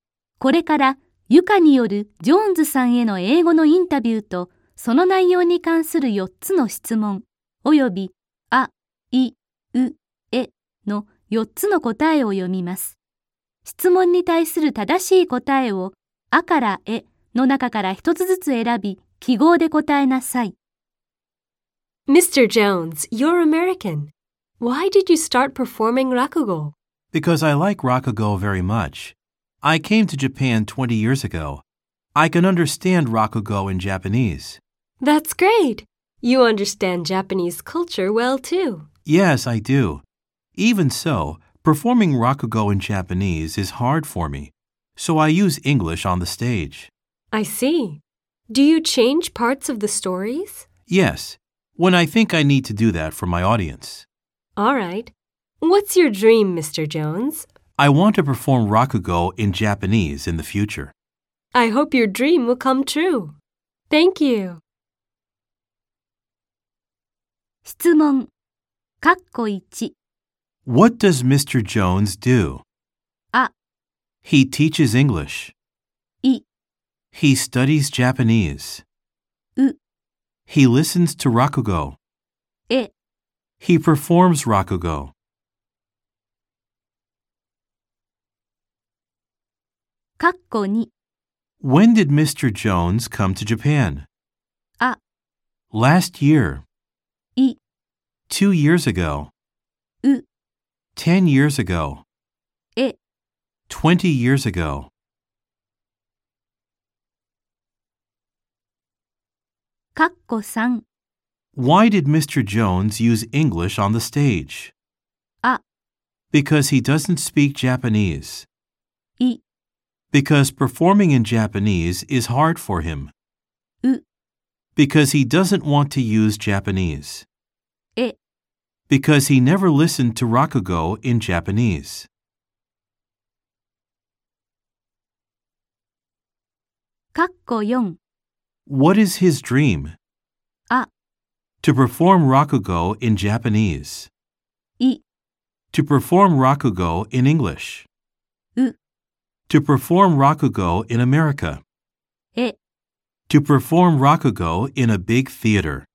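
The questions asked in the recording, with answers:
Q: What does Mr. Jones do?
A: え: He performs rakugo.

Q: When did Mr. Jones come to Japan?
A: え: 20 years ago.

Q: Why did Mr. Jones use English on the stage?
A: い: Because performing in Japanese is hard for him.

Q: What is his dream?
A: あ: To perform rakugo in Japanese.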